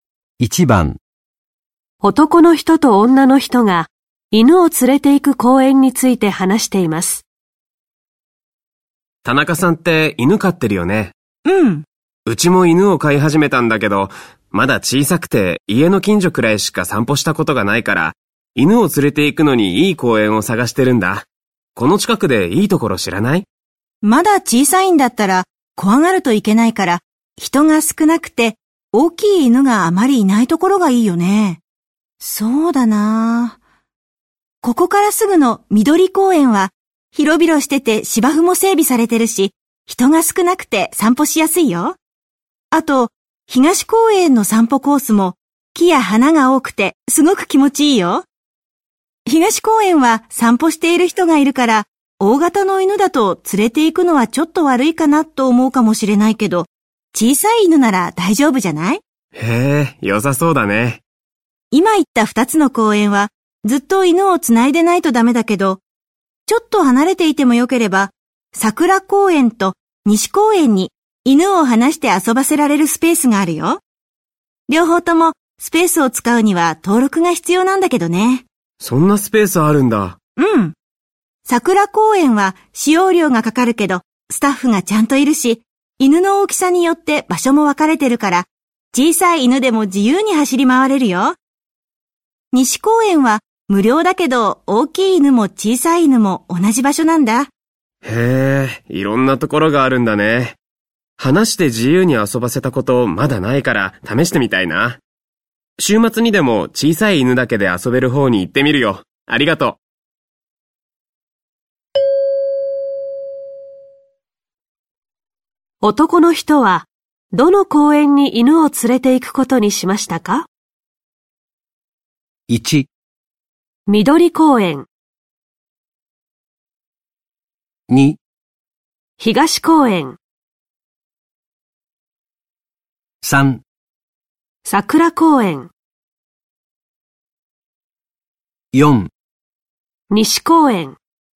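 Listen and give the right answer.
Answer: 3: 桜公園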